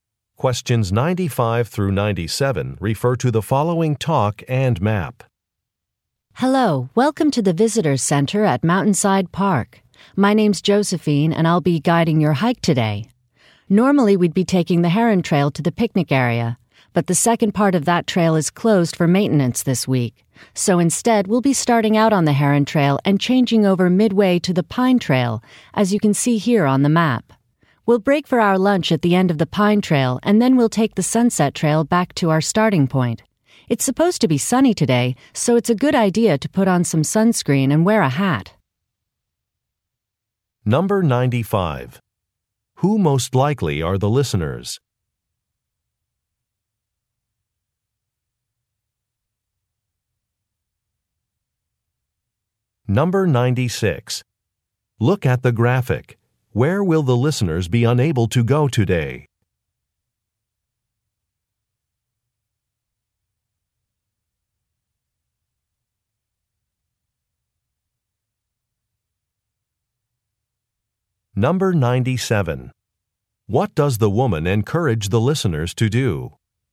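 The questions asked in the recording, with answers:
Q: Who most likely are the listeners?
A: Hikers visiting Mountainside Park

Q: What does the woman encourage the listeners to do?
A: Put on sunscreen and wear a hat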